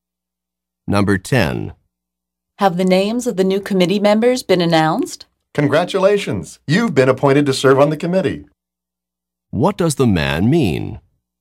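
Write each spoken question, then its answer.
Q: What does the man mean?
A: The woman has been appointed to the committee.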